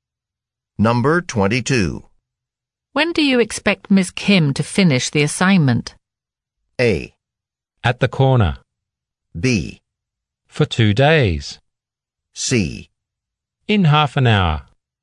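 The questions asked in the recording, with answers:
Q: When do you expect Ms. Kim to finish the assignment?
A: C: In half an hour.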